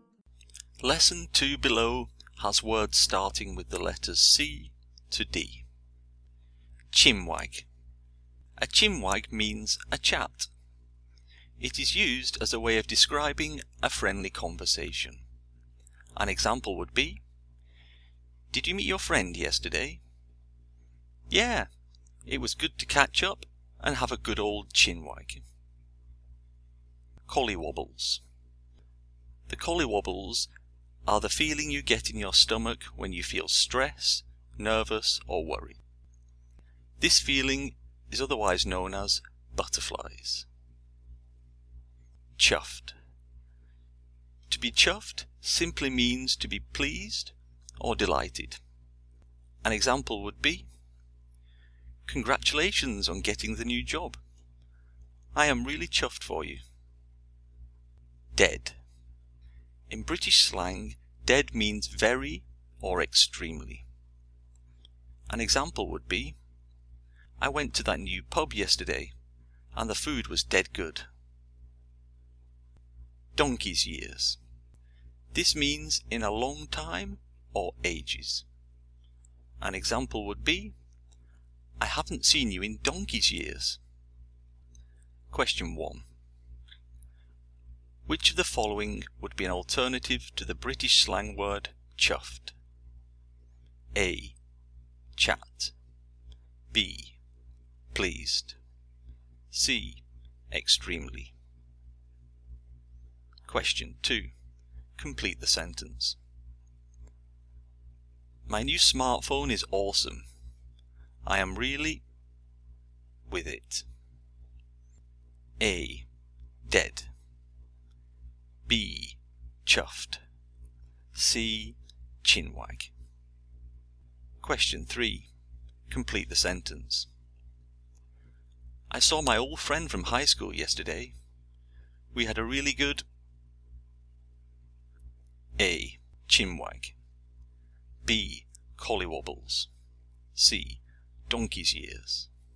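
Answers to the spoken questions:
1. B: Pleased
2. B: Chuffed
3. A: Chinwag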